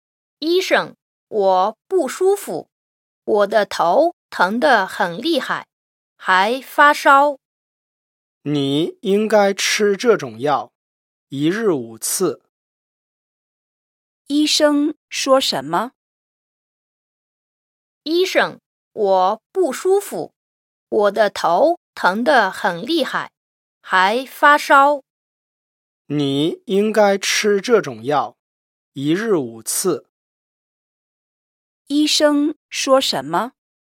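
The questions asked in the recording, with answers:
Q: 医生说什么?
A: 应该吃这种药,一日五次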